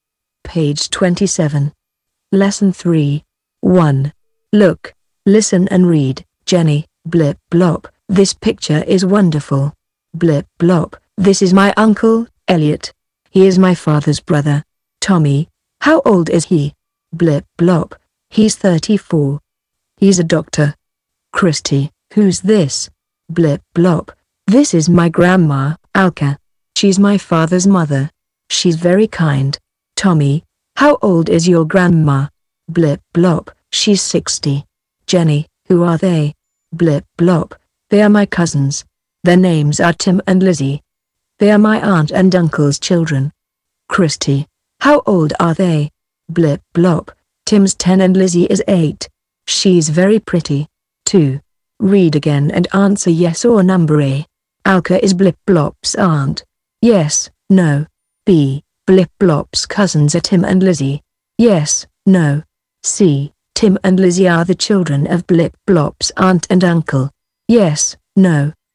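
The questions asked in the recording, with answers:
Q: Alka is Blip blop's aunt.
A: no

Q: Blip blop's cousins are Tim and Lizzie.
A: yes

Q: Tim and Lizzie are the children of Blip blop's aunt and uncle.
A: yes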